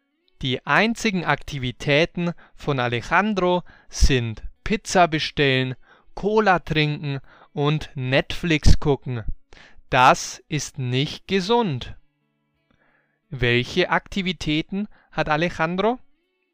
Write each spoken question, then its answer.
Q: Welche Aktivitäten hat Alejandro?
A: Pizza bestellen, Cola trinken und Netflix gucken.